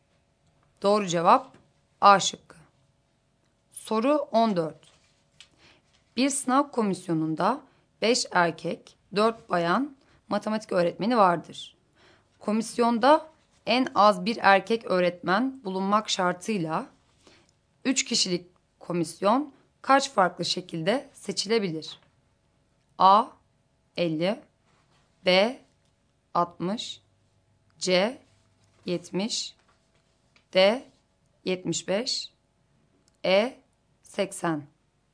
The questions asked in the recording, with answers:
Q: Komisyonda en az bir erkek öğretmen bulunmak şartıyla 3 kişilik komisyon kaç farklı şekilde seçilebilir?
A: Doğru cevap E şıkkı.